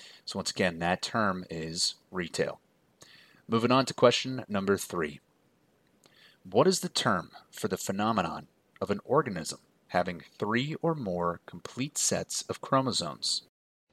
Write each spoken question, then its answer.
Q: What is the term for the phenomenon of an organism having three or more complete sets of chromosomes?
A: And that term is triploid.